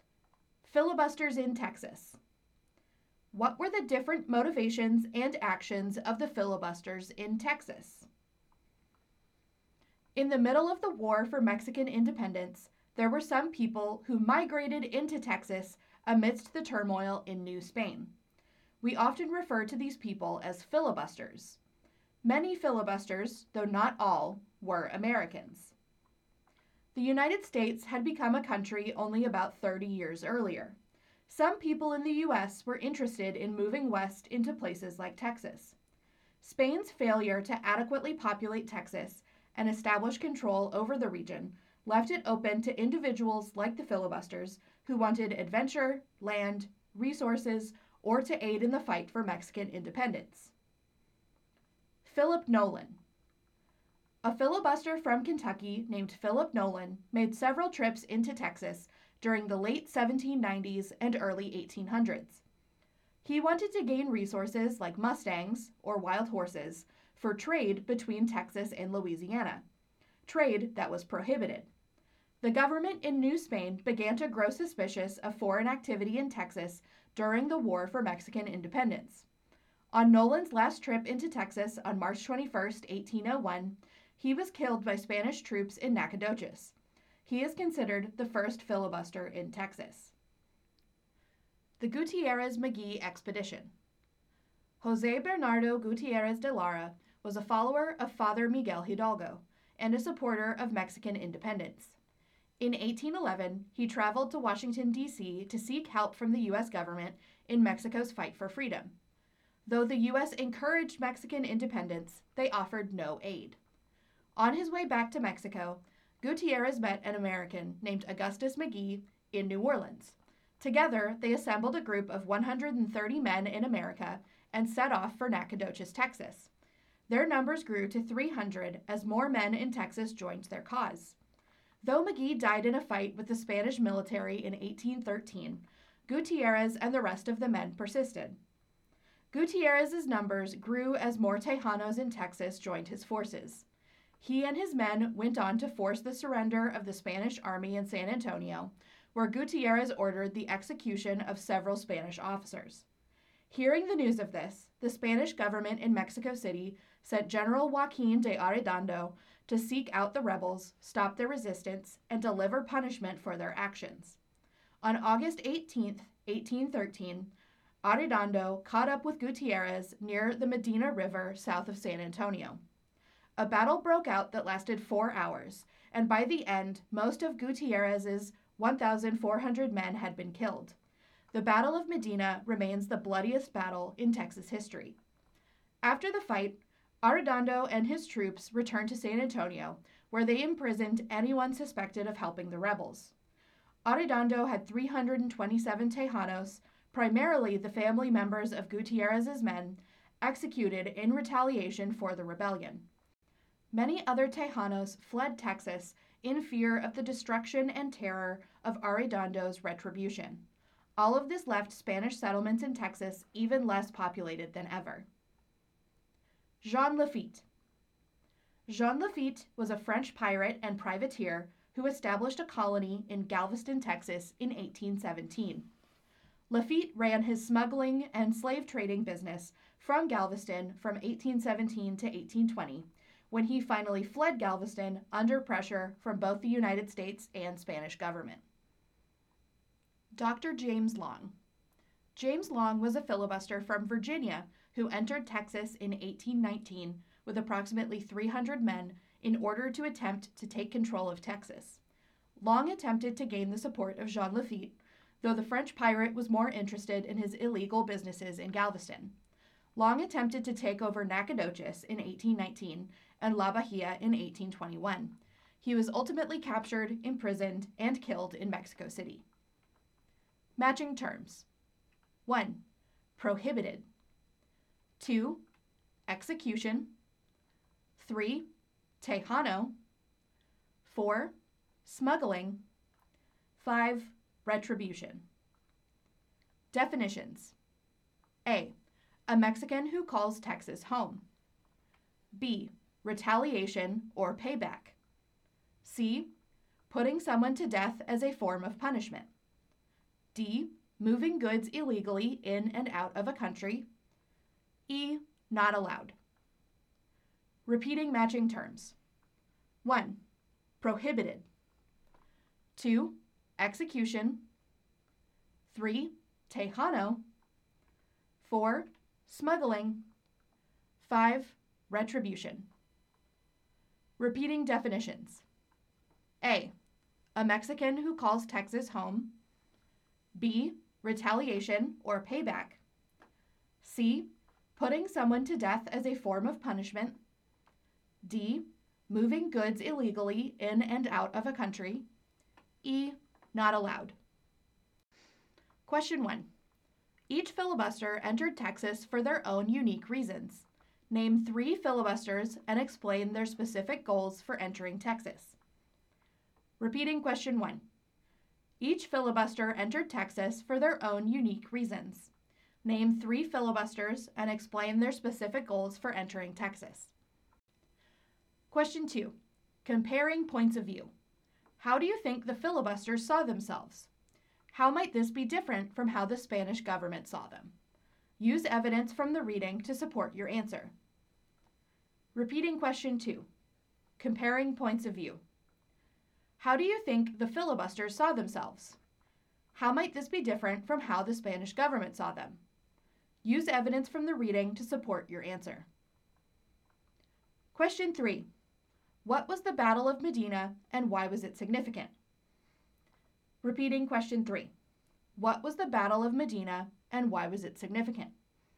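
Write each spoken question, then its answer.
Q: Name 3 filibusters and explain their specific goals for entering Texas.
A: Philip Nolan wanted mustangs for trade; Gutierrez wanted to help Mexican independence; Jean Lafitte ran smuggling and slave trading; James Long wanted to take control of Texas

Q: What was the Battle of Medina and why was it significant?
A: The 1813 battle near the Medina River where Arredondo defeated Gutierrez's forces; it is the bloodiest battle in Texas history and left Texas even less populated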